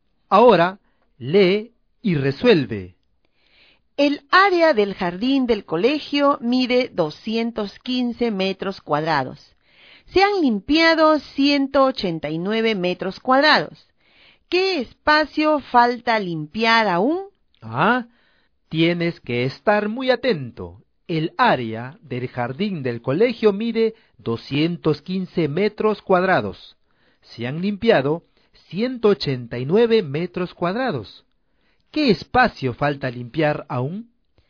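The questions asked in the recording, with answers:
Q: ¿Qué espacio falta limpiar aún?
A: 26 metros cuadrados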